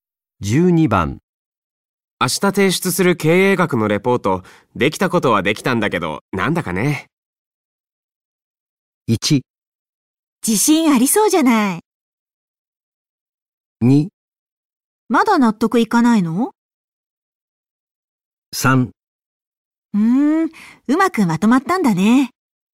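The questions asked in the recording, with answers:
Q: 明日提出する経営学のレポート、できたことはできたんだけど、なんだかね。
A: 2: まだ納得いかないの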